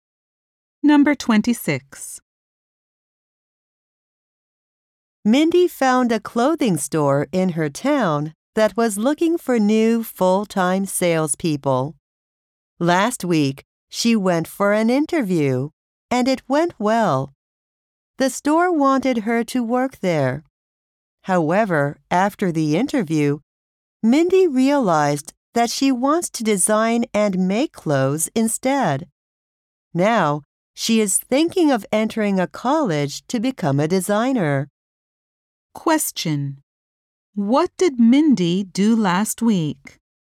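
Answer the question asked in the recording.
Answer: She had a job interview at a clothing store.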